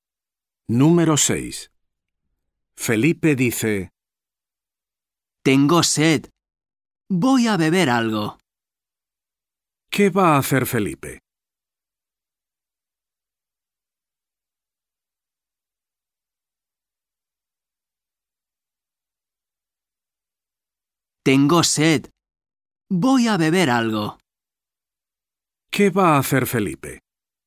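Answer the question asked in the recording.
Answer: Beber algo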